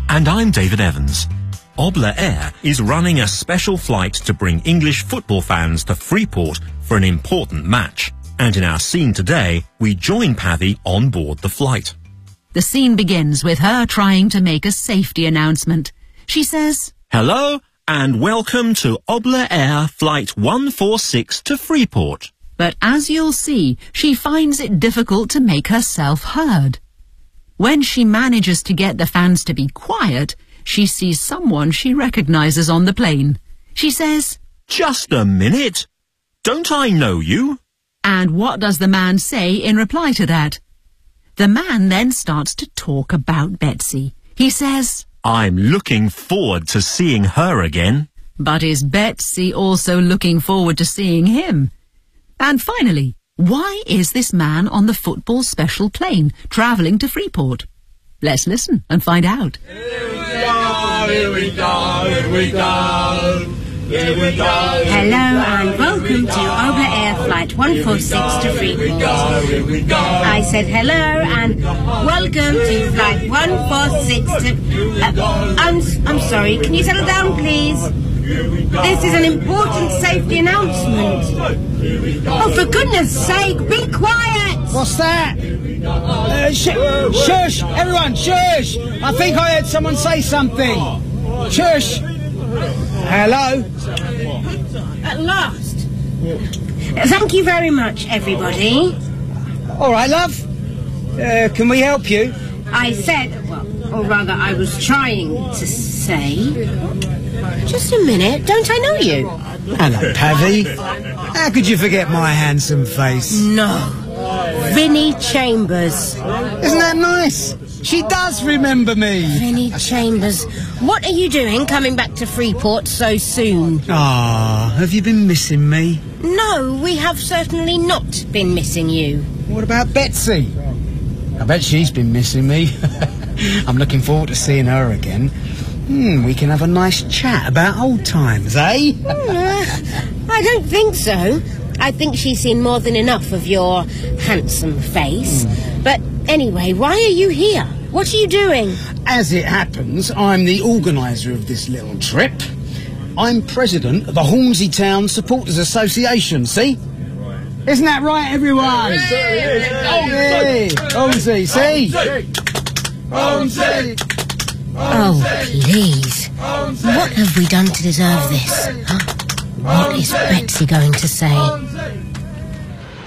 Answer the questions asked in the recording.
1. How could you forget my handsome face?
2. No. Pavi says,
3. Because he's the president of the Hornsey Town Supporters Association.